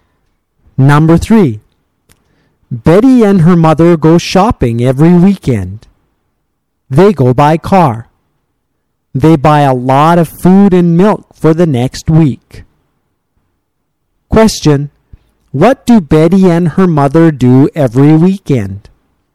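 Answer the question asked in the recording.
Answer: They go shopping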